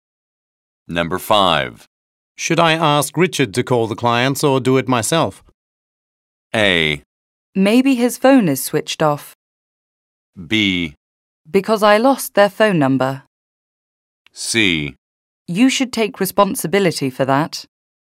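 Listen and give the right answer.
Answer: C: You should take responsibility for that.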